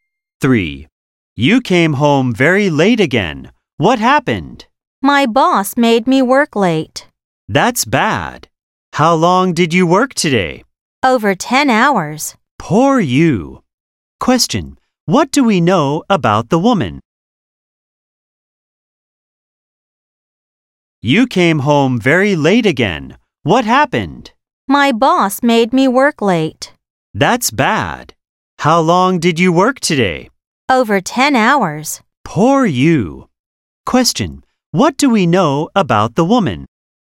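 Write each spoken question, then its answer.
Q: What do we know about the woman?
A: She worked over 10 hours today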